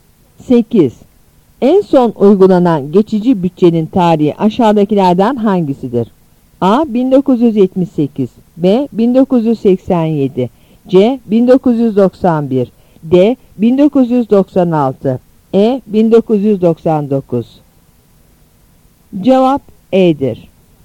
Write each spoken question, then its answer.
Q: En son uygulanan geçici bütçenin tarihi aşağıdakilerden hangisidir?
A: Cevap E'dir.